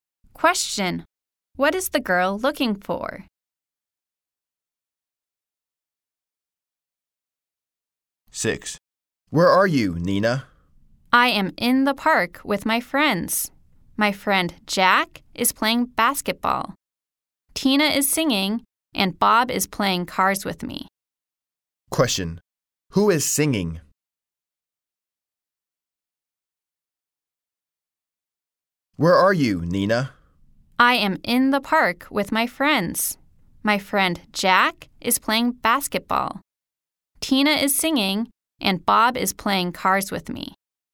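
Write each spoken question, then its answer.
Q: Who is singing?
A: Tina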